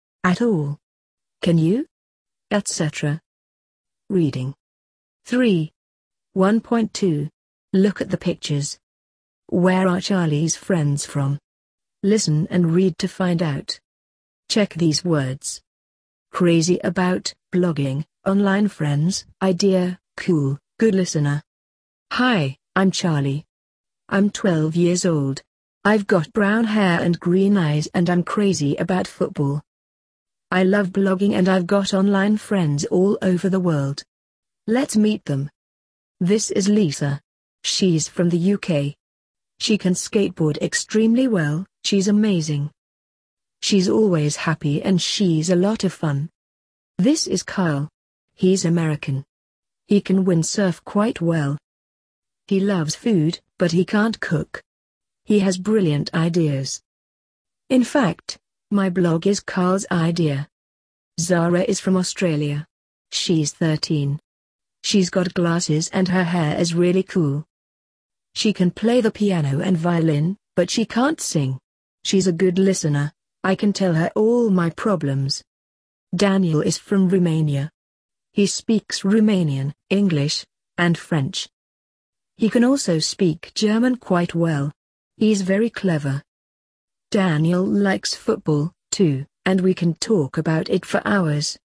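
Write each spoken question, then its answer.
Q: Where are Charlie's friends from?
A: Lisa is from the UK, Kyle is from the USA, Zara is from Australia and Daniel is from Romania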